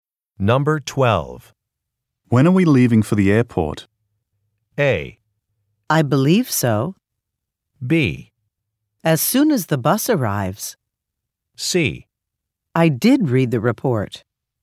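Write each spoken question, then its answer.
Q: When are we leaving for the airport?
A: B: As soon as the bus arrives.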